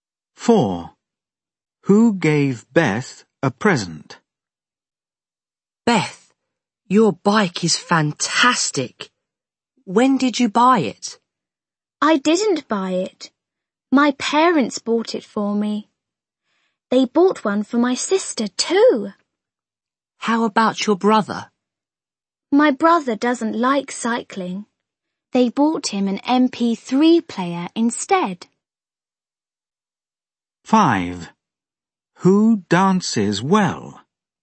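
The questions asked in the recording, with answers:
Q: Who gave Beth a present?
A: Her parents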